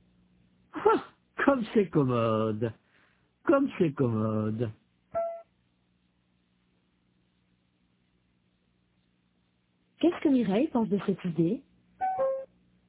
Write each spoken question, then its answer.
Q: Qu'est-ce que Mireille pense de cette idée?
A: Elle pense que c'est commode.